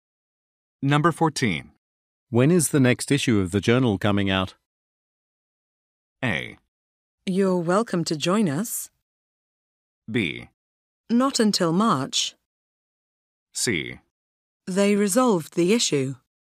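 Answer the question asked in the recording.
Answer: B: Not until March.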